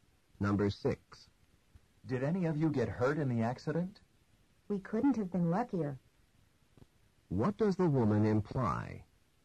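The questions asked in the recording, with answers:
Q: What does the woman imply?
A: They were very lucky; nobody was hurt.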